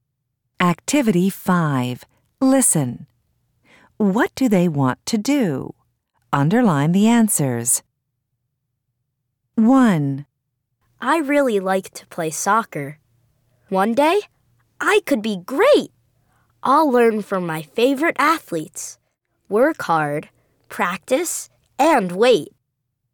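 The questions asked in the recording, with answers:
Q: What do they want to do?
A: be a great soccer player (athlete)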